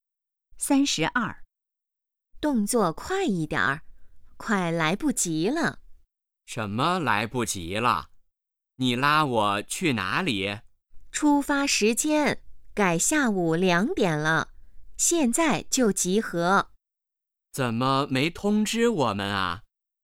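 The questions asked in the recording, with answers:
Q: 女的为什么着急?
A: 出发时间改成下午2点了,现在就要集合,快来不及了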